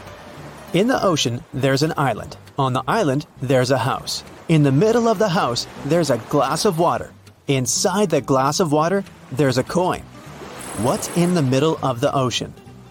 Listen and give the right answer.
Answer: The correct answer is simple, the letter E.